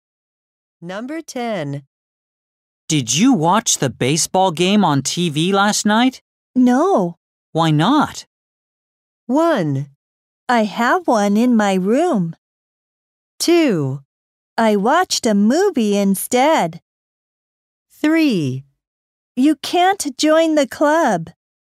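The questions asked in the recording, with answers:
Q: Why not?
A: 2: I watched a movie instead.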